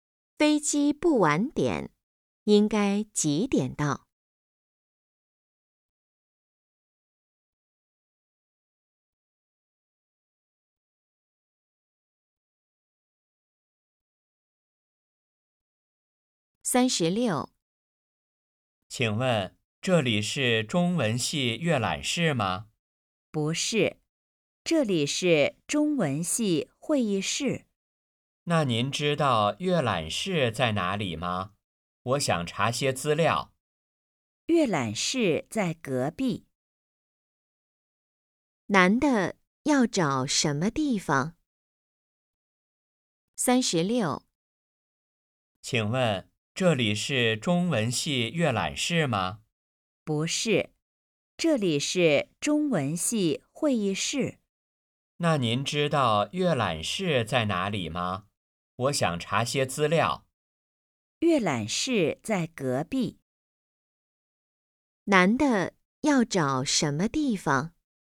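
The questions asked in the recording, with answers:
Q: 男的要找什么地方?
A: 中文系阅览室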